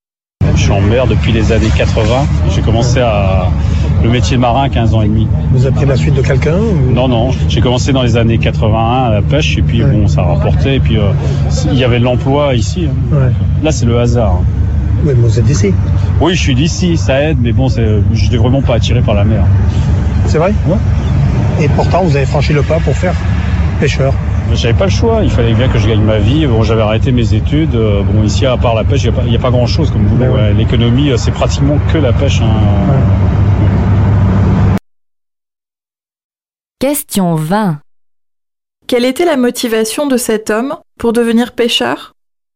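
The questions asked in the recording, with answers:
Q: Quelle était la motivation de cet homme pour devenir pêcheur ?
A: Il devait gagner sa vie : la pêche était presque le seul emploi dans la région.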